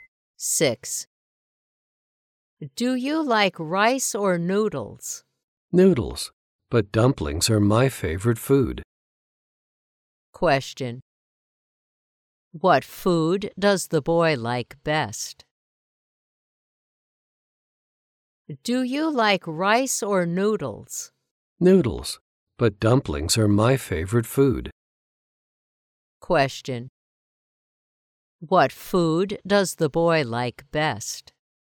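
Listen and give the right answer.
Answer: Dumplings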